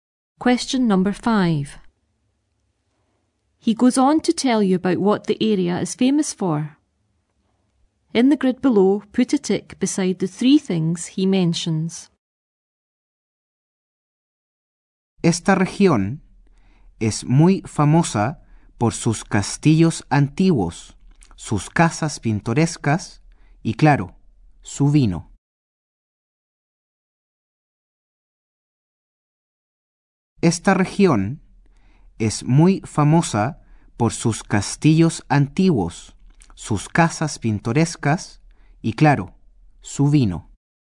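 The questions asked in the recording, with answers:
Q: put a tick beside the three things he mentions.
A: Old castles, picturesque houses and wine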